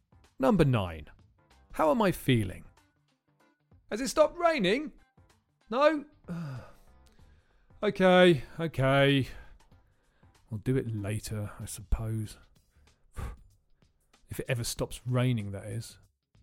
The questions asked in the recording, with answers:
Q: How am I feeling?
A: I'm feeling fed up.